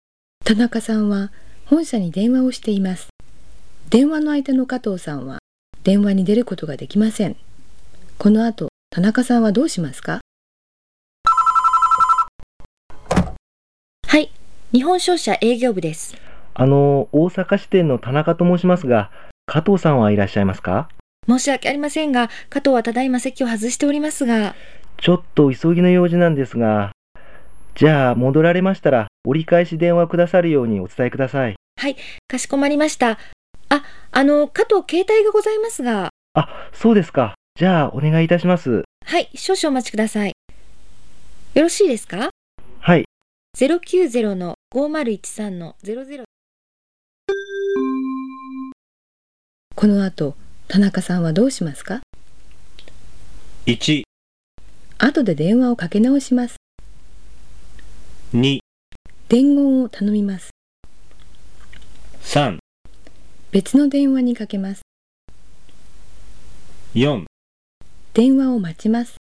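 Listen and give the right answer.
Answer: 3: 別の電話にかけます。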